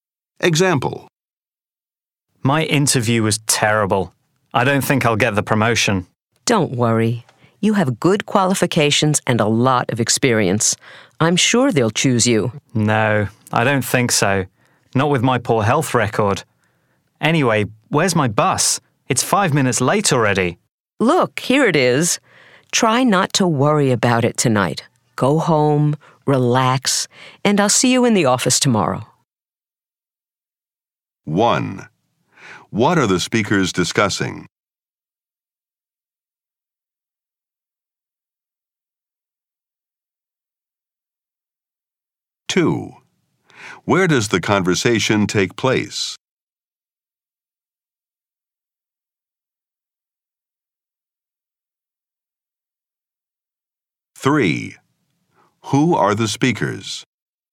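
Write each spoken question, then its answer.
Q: What are the speakers discussing?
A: A job interview for a promotion

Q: Where does the conversation take place?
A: At a bus stop

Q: Who are the speakers?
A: Colleagues who work in the same office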